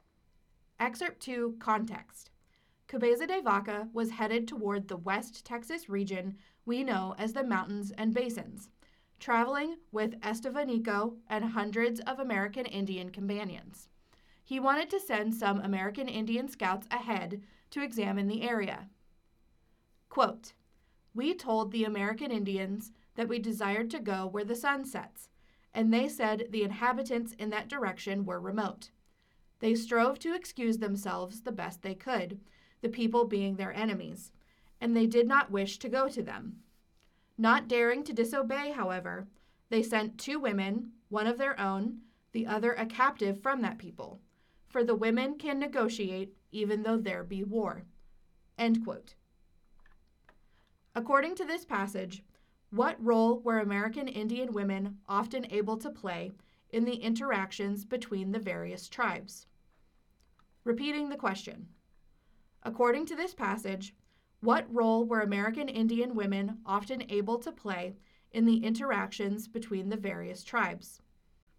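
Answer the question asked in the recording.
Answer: They could act as negotiators, even during war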